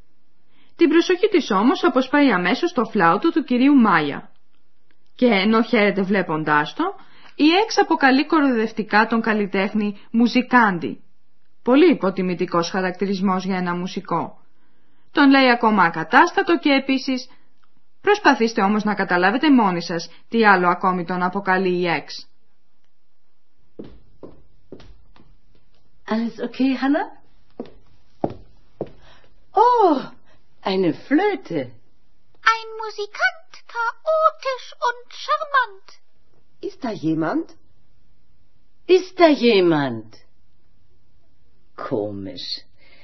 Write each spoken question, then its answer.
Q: Προσπαθήστε όμως να καταλάβετε μόνοι σας τι άλλο ακόμη τον αποκαλεί η Εξ.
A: Η Εξ αποκαλεί ακόμη τον νεαρό μουσικό γοητευτικό